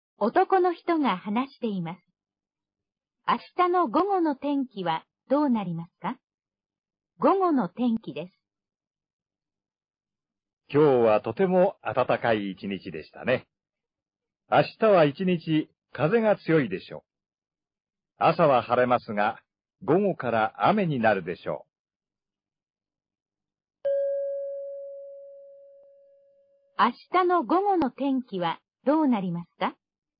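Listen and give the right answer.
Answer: 雨で、風が強い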